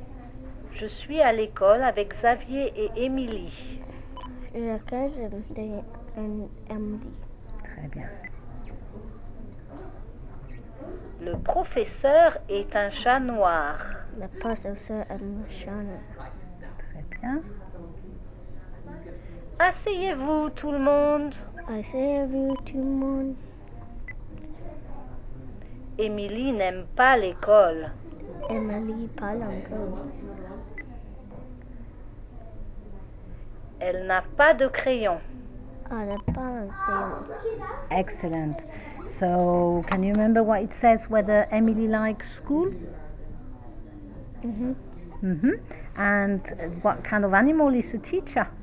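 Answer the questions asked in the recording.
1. No, she doesn't like school
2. A black cat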